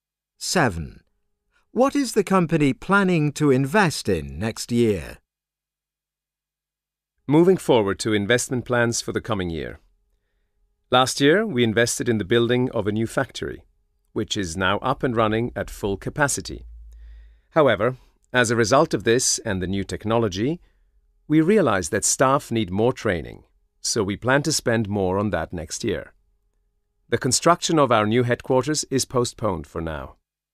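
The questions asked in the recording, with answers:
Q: What is the company planning to invest in next year?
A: Staff training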